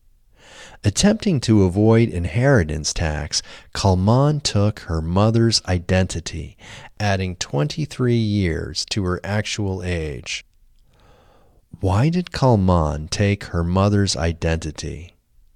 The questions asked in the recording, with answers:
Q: Why did Kalman take her mother's identity?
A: Kalman took her mother's identity to avoid inheritance tax.